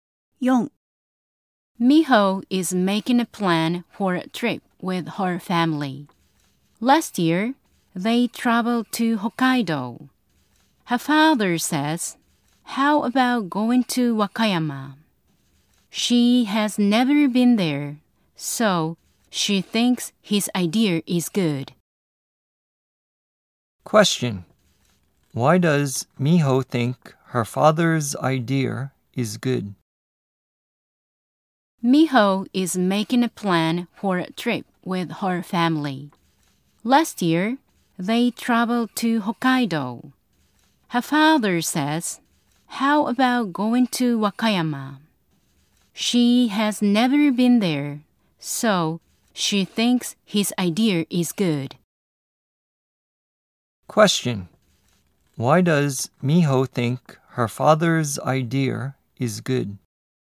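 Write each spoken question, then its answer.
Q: Why does Miho think her father's idea is good?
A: Because she has never been to Wakayama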